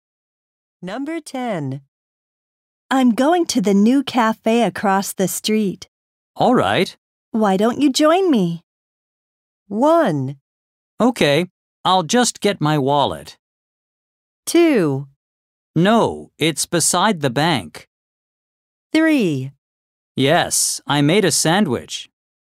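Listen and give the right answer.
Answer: 1: Okay, I'll just get my wallet.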